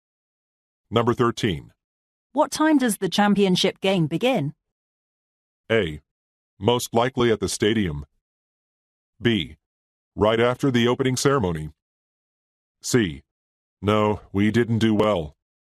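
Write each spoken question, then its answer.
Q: What time does the championship game begin?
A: B: Right after the opening ceremony.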